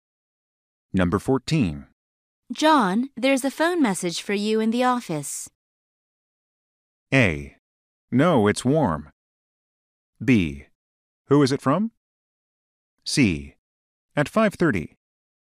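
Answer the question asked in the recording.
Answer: B: Who is it from?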